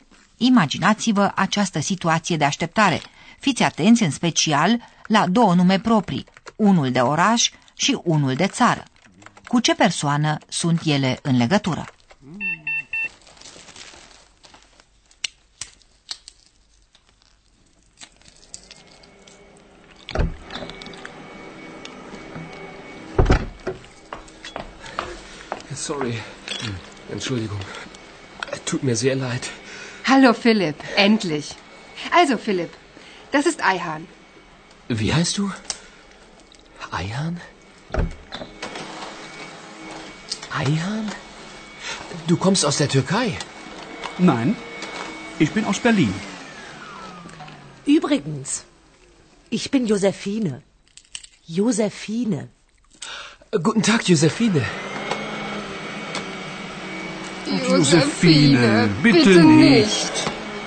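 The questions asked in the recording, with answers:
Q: Cu ce persoană sunt ele în legătură?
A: Cu Aihan (Berlin și Turcia)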